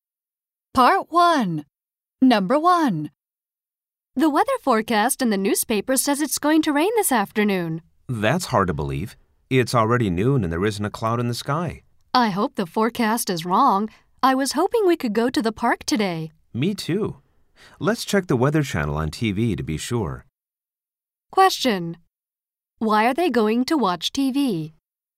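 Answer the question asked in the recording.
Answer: To check the weather forecast and be sure whether it will rain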